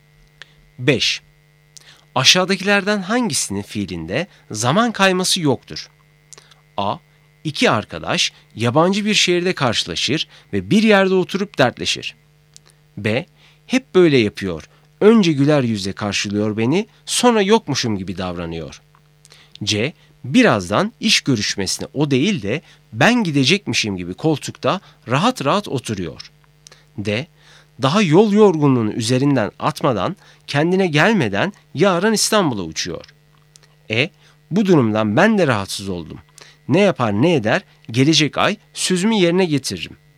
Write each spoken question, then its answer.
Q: Aşağıdakilerden hangisinin fiilinde zaman kayması yoktur?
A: Doğru cevap C.